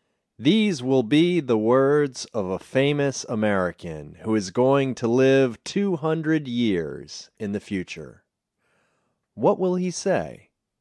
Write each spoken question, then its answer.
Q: What will he say?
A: He will say, "Give me liberty or give me death."